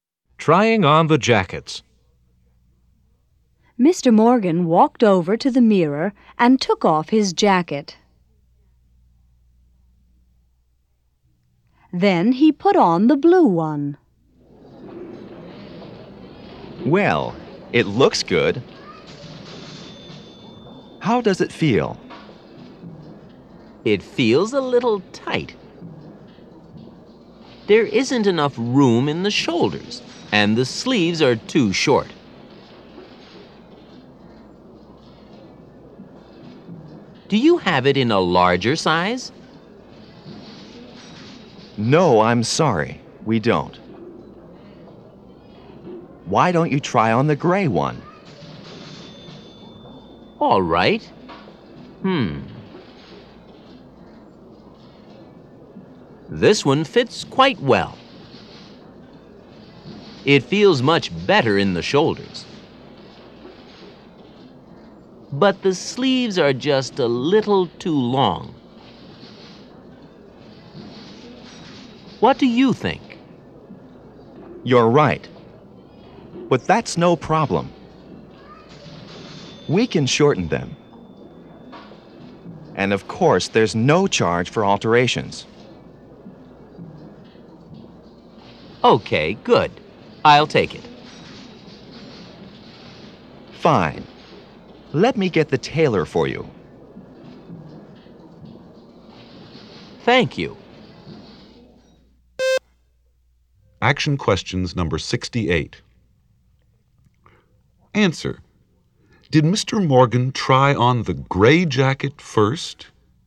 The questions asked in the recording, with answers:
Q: Did Mr. Morgan try on the gray jacket first?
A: No, he didn't.